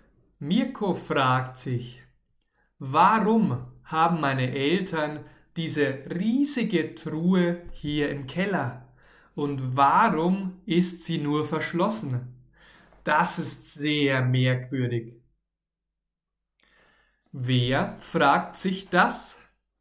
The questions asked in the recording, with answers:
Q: Wer fragt sich das?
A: Mirko, unser Freund Mirko fragt sich das.